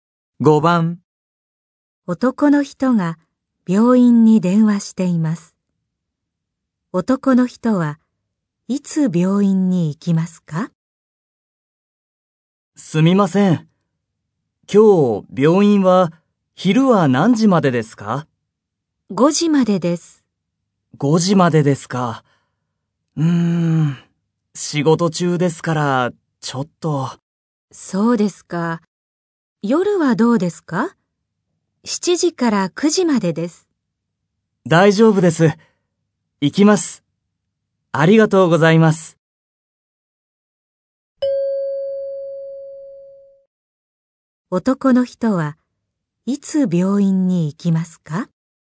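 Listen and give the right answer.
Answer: 今日の夜(7時から9時の間)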